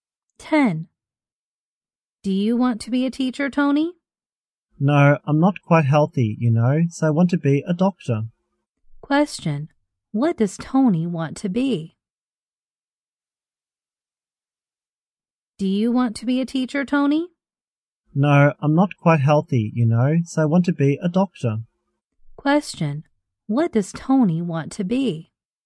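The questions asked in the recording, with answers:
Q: Question. What does Tony want to be?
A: A doctor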